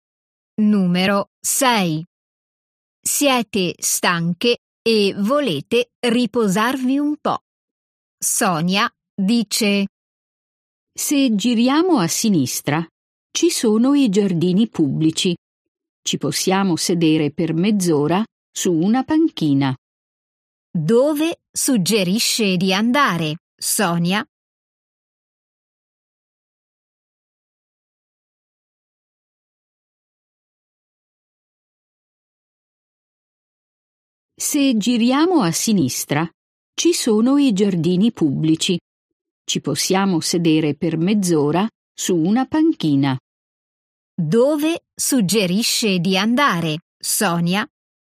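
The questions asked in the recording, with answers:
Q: Dove suggerisce di andare, Sonia?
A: ai giardini pubblici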